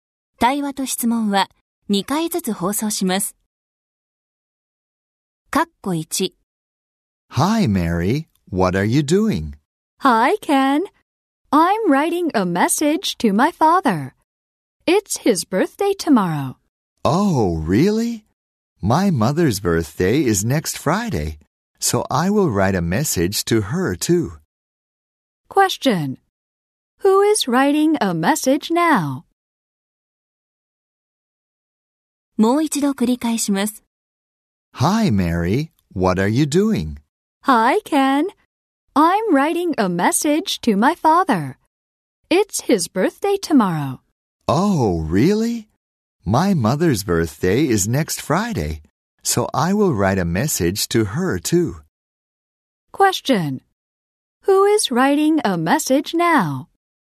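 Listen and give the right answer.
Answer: Mary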